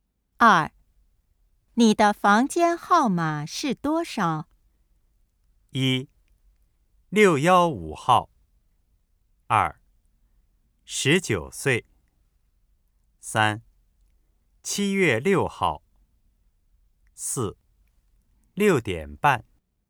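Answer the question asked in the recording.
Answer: 一: 615号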